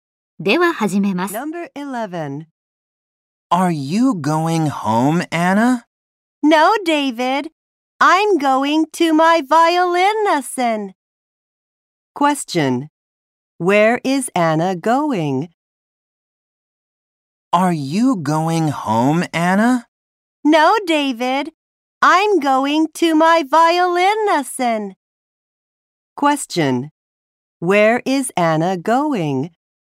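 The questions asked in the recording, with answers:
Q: Question. Where is Anna going?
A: To her violin lesson.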